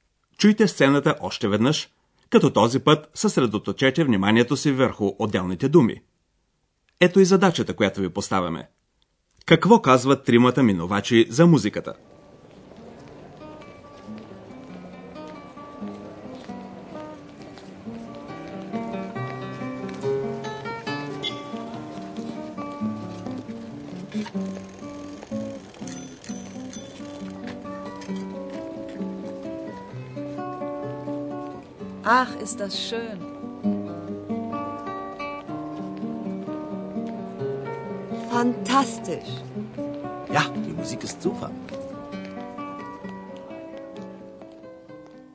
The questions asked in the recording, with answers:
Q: Какво казват тримата минувачи за музиката?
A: Всички са въодушевени от музиката.